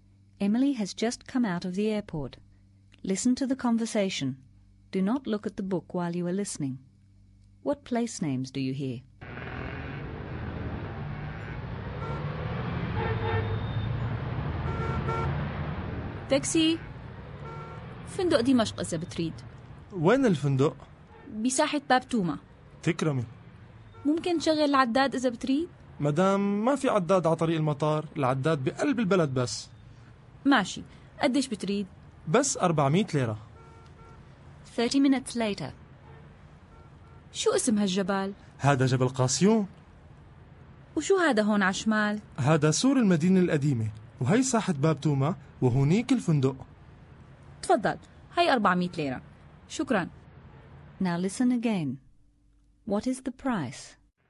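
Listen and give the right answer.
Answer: Damascus Hotel, Bab Touma Square, the airport, Mount Qasioun, the Old City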